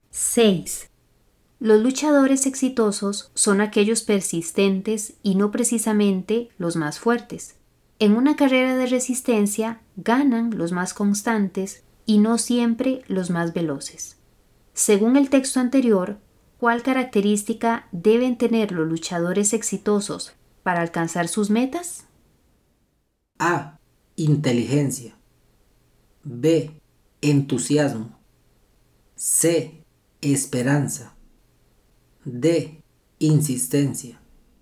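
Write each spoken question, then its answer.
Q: Según el texto anterior, ¿cuál característica deben tener los luchadores exitosos para alcanzar sus metas?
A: D: Insistencia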